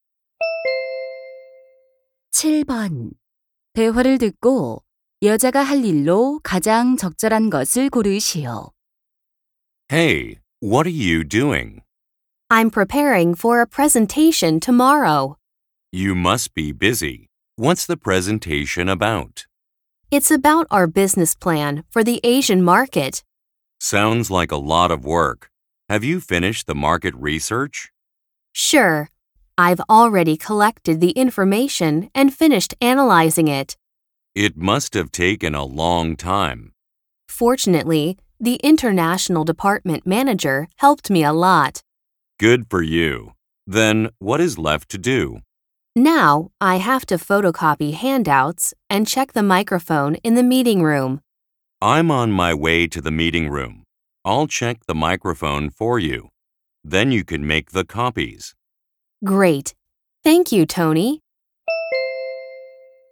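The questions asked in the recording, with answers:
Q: 대화를 듣고 여자가 할 일로 가장 적절한 것을 고르시오.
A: 유인물 복사하기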